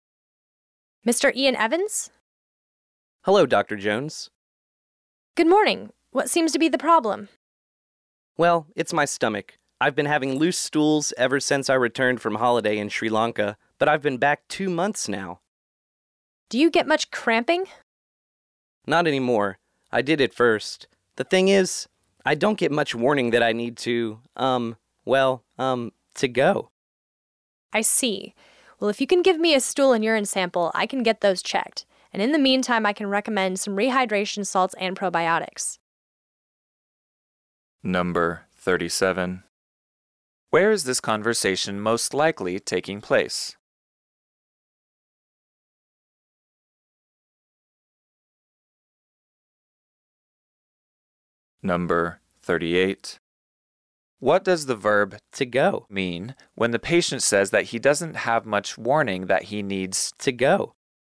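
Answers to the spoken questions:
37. At a doctor's office
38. To use the toilet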